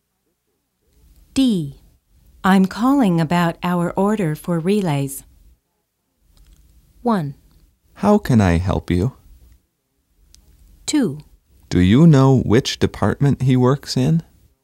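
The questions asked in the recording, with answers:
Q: I'm calling about our order for relays.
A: 1: How can I help you?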